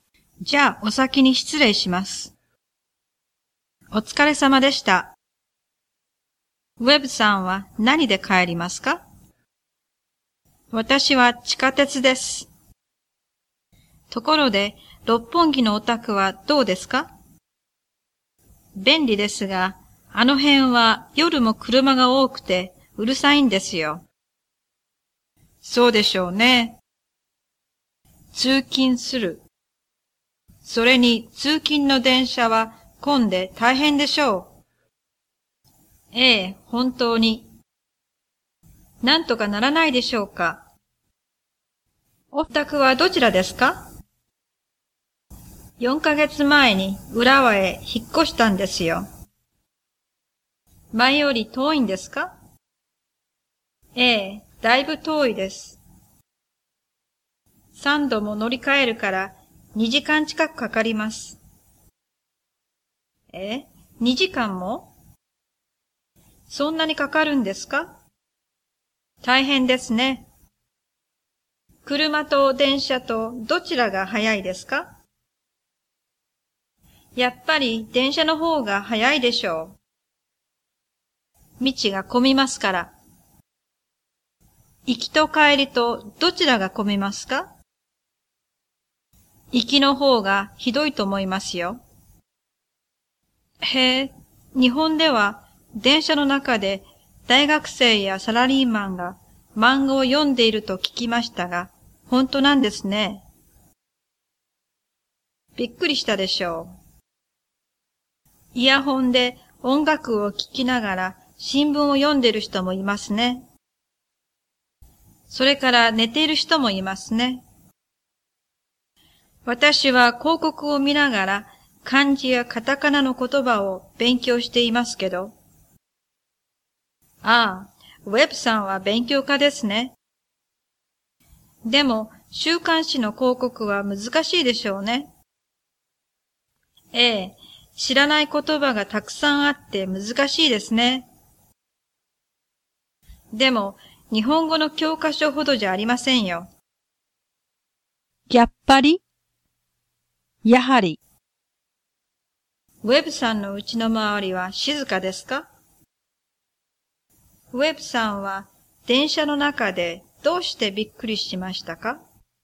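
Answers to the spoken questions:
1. いいえ、夜も車が多くてうるさいです。
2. 大学生やサラリーマンが漫画を読んでいたから。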